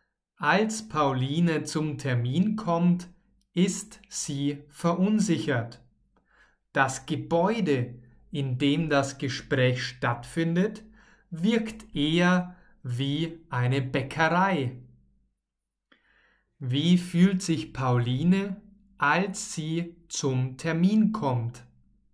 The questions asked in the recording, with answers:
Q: Wie fühlt sich Pauline, als sie zum Termin kommt?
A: verunsichert. Sie fühlt sich oder ist verunsichert.